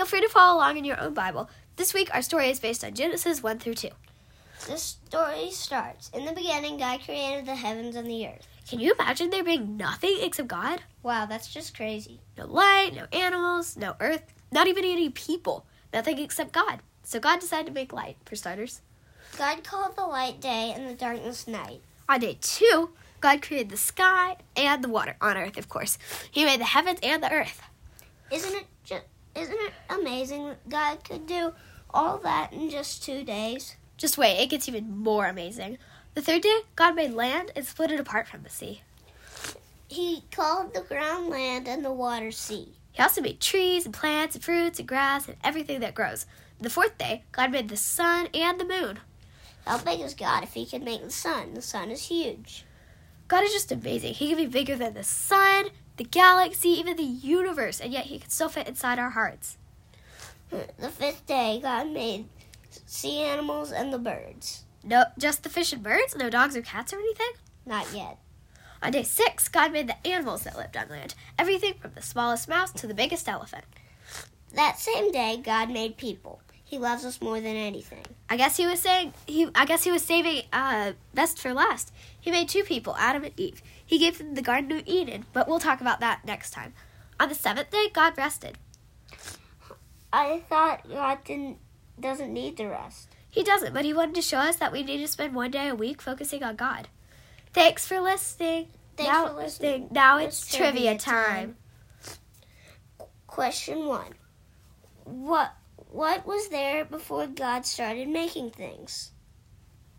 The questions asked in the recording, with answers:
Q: What was there before God started making things?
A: Nothing. Just God.